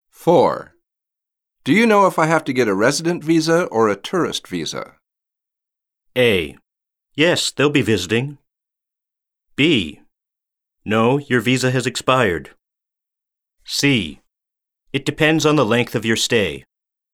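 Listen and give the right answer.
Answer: C: It depends on the length of your stay.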